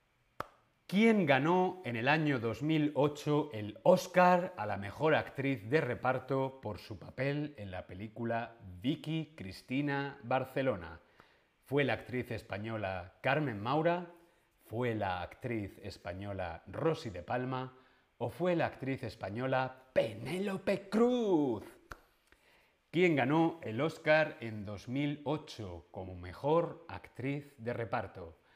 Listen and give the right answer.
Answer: Penélope Cruz. Eso es Penélope Cruz.